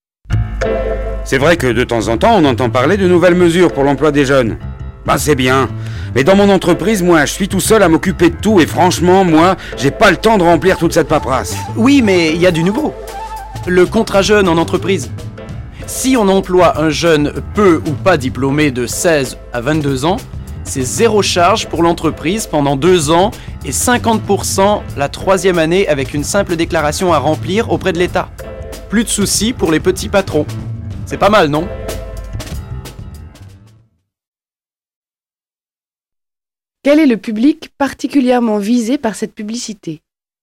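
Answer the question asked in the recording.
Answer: Les petits patrons (chefs de petites entreprises)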